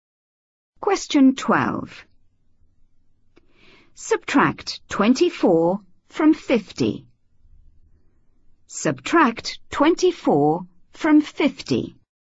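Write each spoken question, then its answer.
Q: Subtract 24 from 50.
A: 26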